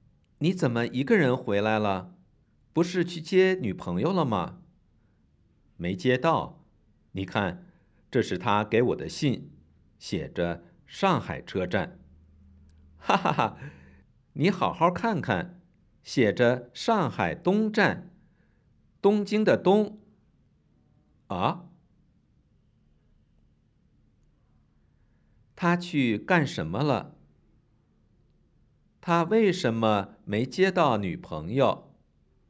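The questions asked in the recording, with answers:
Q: 他去干什么了?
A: 去接女朋友

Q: 他为什么没接到女朋友?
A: 他去错了车站,女朋友在上海东站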